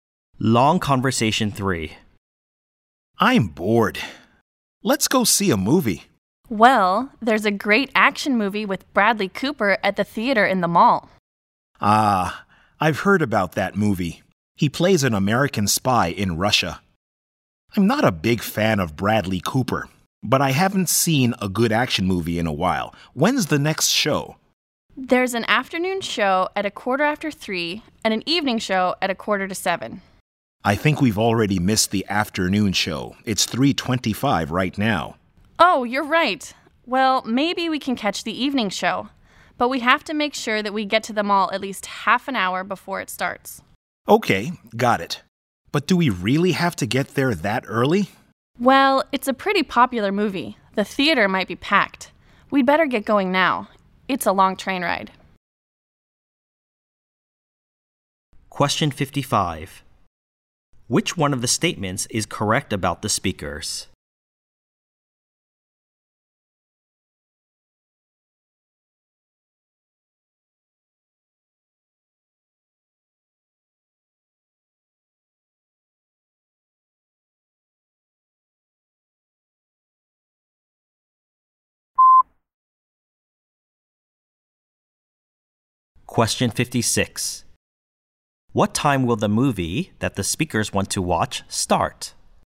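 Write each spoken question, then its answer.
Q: What time will the movie that the speakers want to watch start?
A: 6:45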